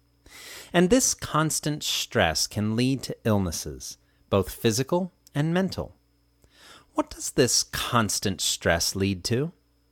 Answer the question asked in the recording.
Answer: It leads to illnesses, both physical and mental.